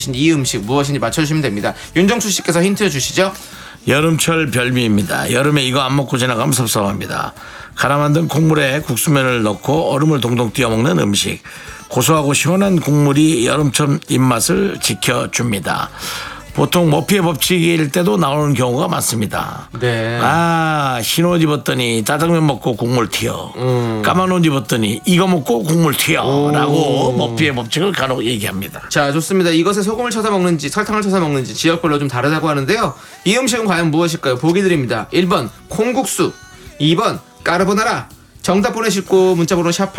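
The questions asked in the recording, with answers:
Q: 이 음식은 과연 무엇일까요?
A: 1번: 콩국수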